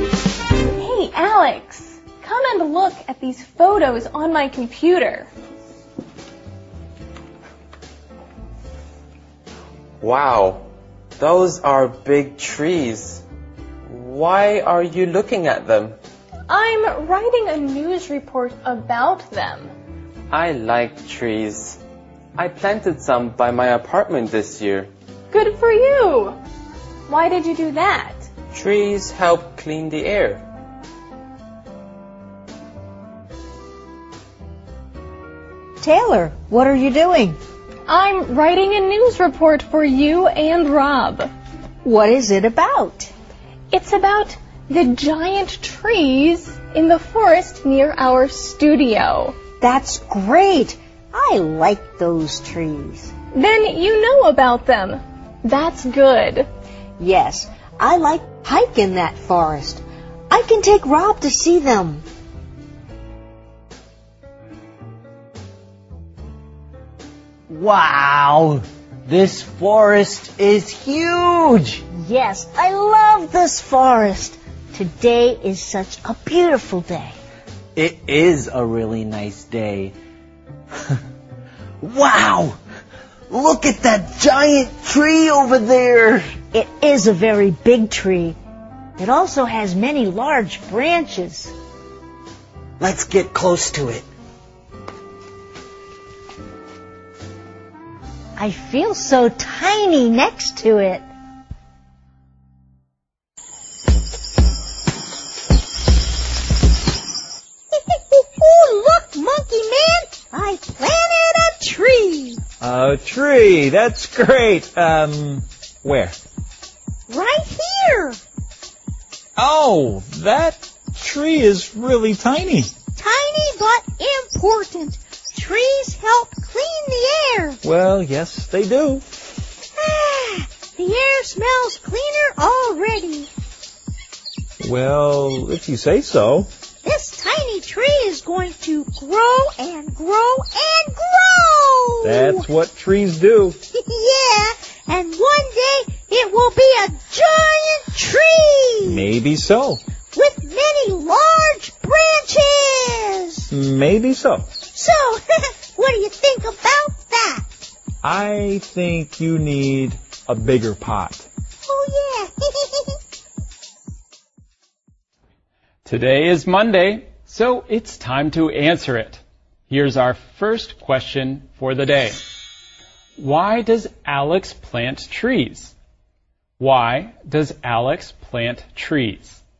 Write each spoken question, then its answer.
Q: Why does Alex plant trees?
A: Trees help clean the air.